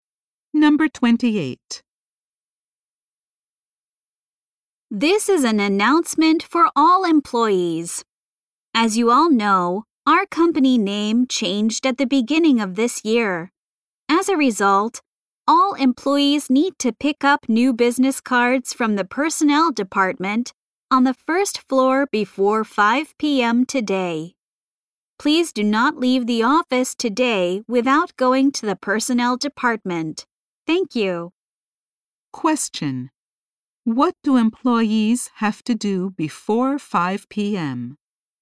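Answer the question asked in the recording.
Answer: Pick up new business cards from the personnel department.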